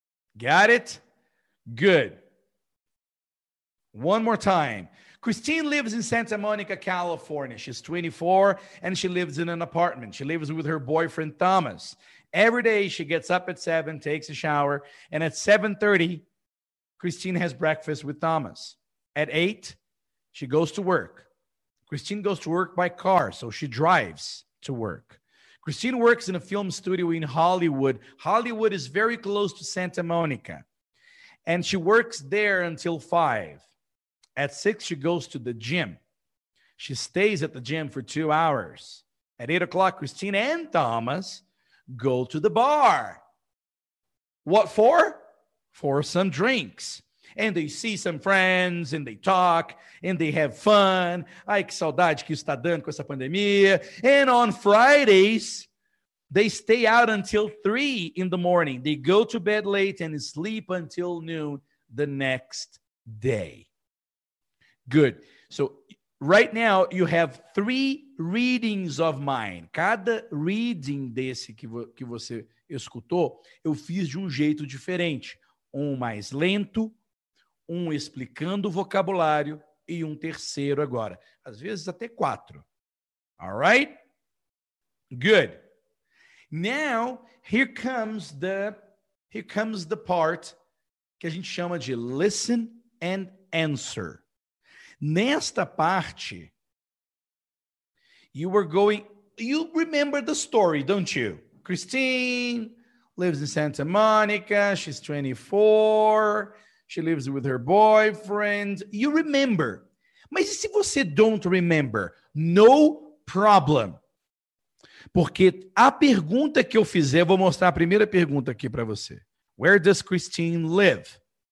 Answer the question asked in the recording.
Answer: Em Santa Mônica. Christine lives in Santa Mônica.